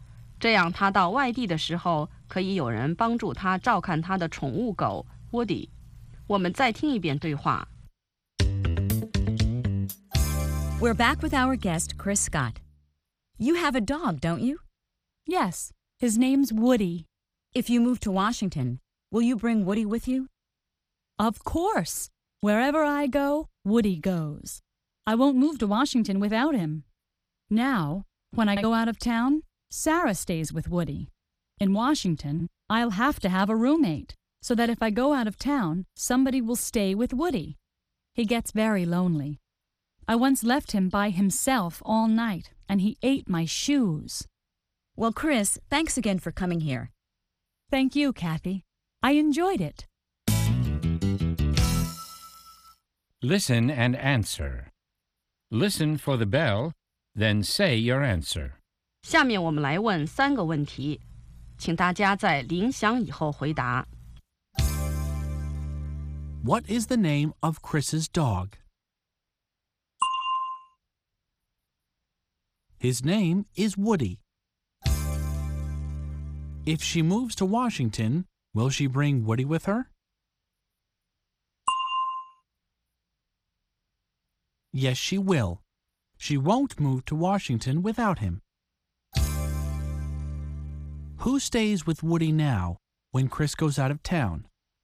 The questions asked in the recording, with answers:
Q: What is the name of Chris's dog?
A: His name is Woody.

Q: Who stays with Woody now when Chris goes out of town?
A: When Chris goes out of town, Sarah stays with Woody.